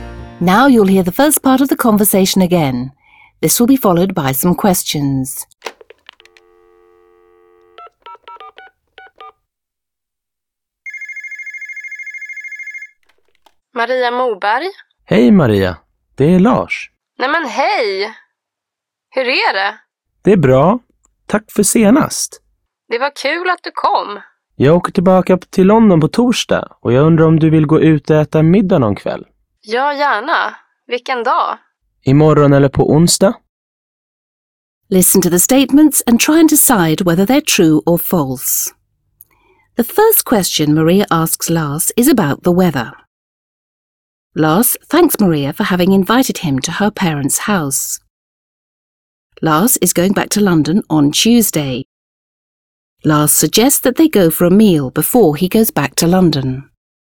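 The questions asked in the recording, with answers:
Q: The first question Maria asks Lars is about the weather.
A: False

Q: Lars is going back to London on Tuesday.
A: False

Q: Lars suggests that they go for a meal before he goes back to London.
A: True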